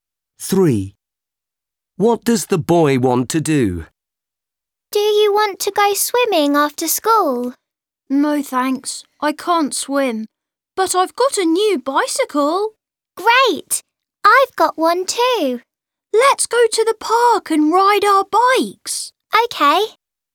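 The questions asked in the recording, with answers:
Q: What does the boy want to do?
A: Ride bikes in the park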